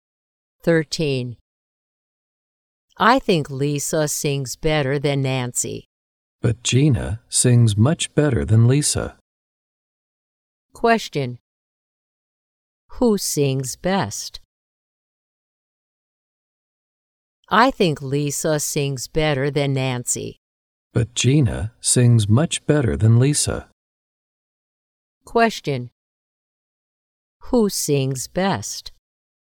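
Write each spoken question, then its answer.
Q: Who sings best?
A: Gina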